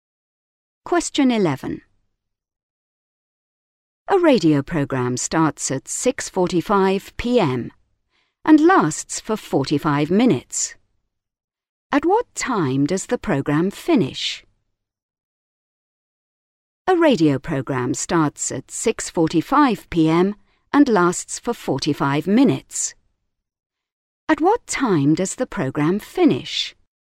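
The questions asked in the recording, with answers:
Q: At what time does the program finish?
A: 7:30 p.m.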